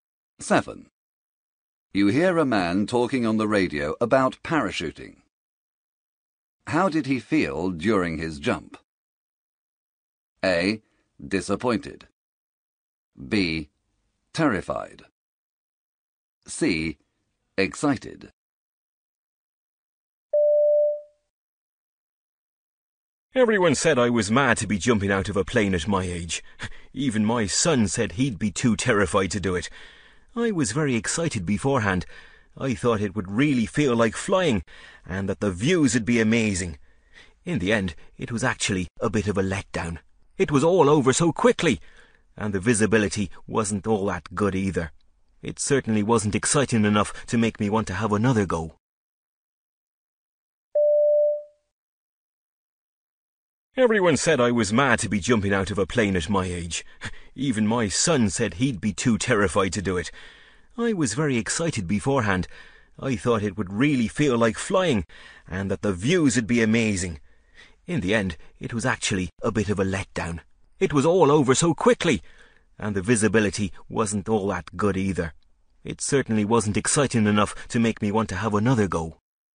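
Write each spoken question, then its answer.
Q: How did he feel during his jump?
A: A: Disappointed.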